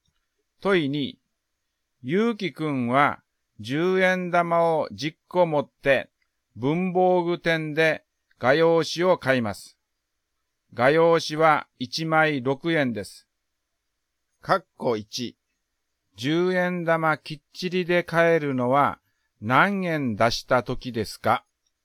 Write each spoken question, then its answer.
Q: 括弧1、10円玉きっちりで買えるのは何円出した時ですか?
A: 括弧1の答えは30円、60円、90円です。